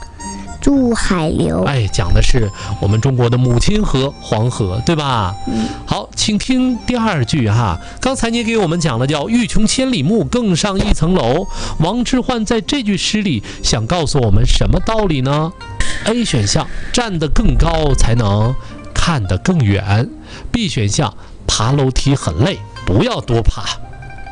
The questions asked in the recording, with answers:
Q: 刚才你给我们讲了叫欲穷千里目,更上一层楼,王之涣在这句诗里想告诉我们什么道理呢?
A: 站得更高才能看得